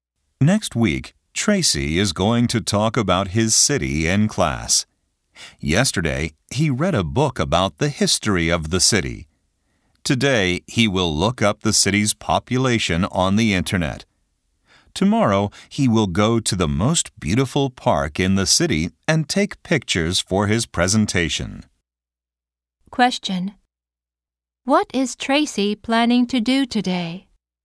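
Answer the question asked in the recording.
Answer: Look up the city's population on the internet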